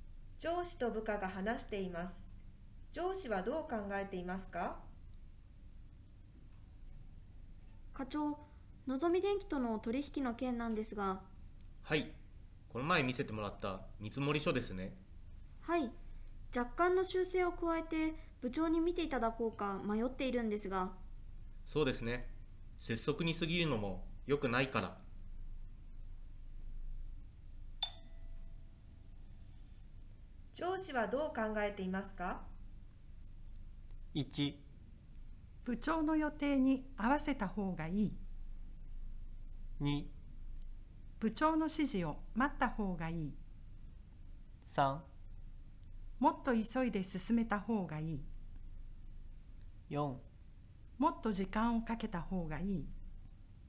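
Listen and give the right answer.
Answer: 4: もっと時間をかけた方がいい。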